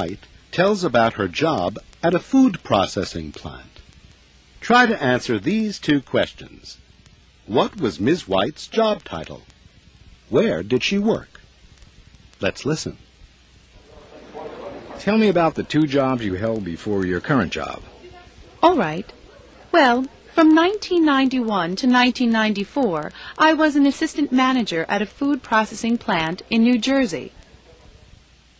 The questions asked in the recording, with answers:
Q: What was Ms. White's job title?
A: She was assistant manager.

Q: Where did she work?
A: Ms. White didn't give the name of the company, but she said she worked at a food processing plant in New Jersey.